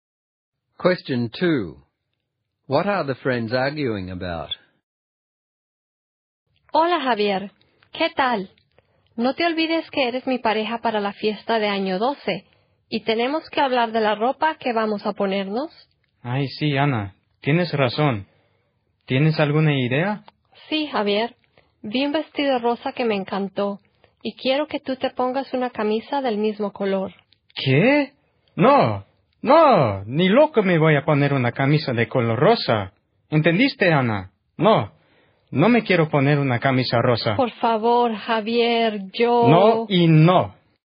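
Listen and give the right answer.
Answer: What Javier will wear to the Year 12 party: Ana wants him to wear a pink shirt to match her pink dress, and he refuses.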